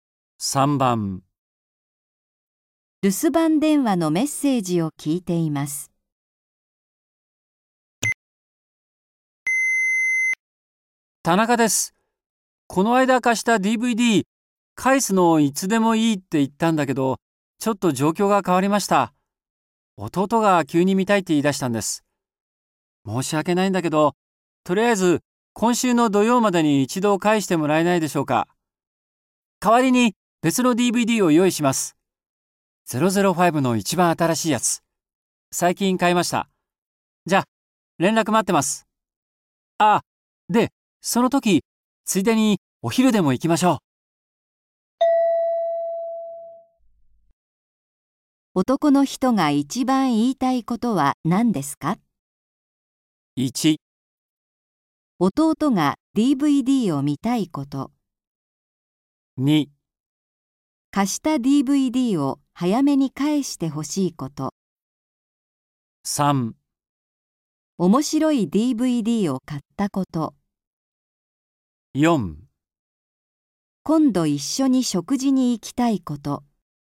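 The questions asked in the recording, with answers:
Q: 男の人が一番言いたいことは何ですか?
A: 2: 貸した DVD を早めに返してほしいこと。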